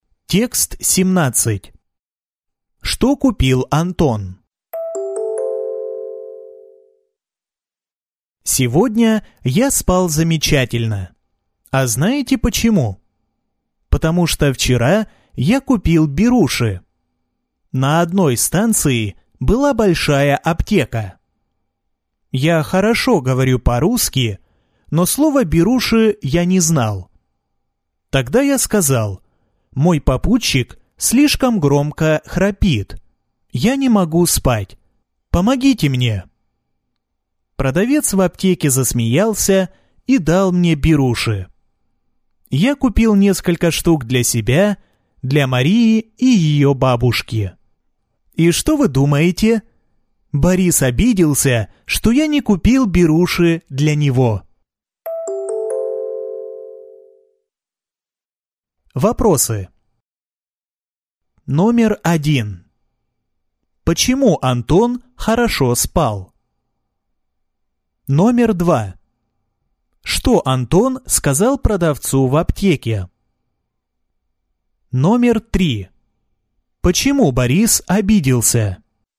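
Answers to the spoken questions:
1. Потому что он купил беруши
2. Мой попутчик слишком громко храпит. Я не могу спать. Помогите мне!
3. Потому что Антон не купил беруши для него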